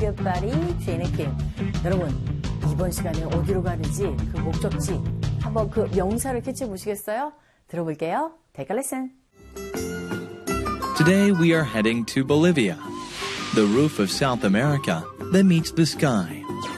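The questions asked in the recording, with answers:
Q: 여러분, 이번 시간에 어디로 가는지, 그 목적지, 한번 그 명사를 캐치해 보시겠어요?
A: Bolivia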